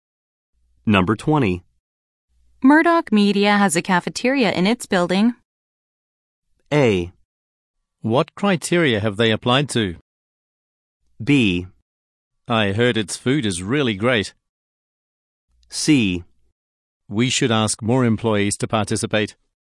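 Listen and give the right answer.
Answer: B: I heard its food is really great.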